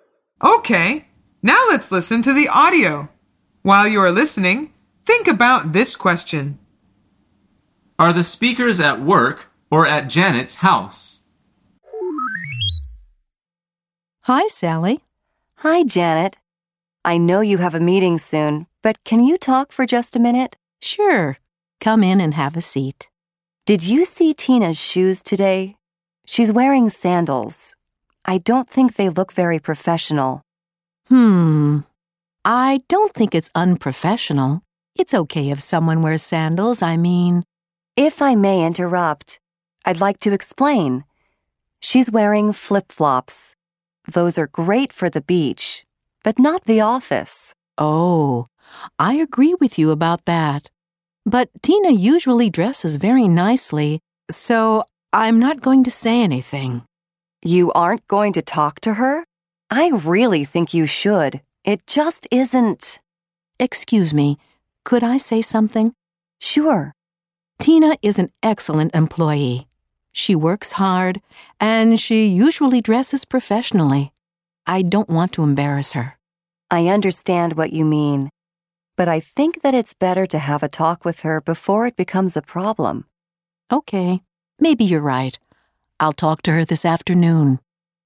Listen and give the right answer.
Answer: The answer is they are at work.